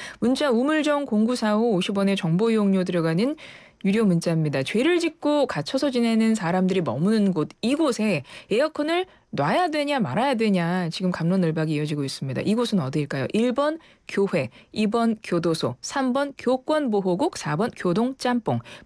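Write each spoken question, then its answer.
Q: 이곳은 어디일까요? 1번 교회, 2번 교도소, 3번 교권보호국, 4번 교동짬뽕.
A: 2: 교도소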